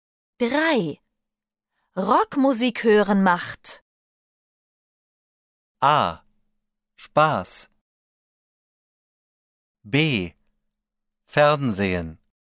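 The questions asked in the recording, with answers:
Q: Rockmusik hören macht. A. Spaß. B. Fernsehen.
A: A: Spaß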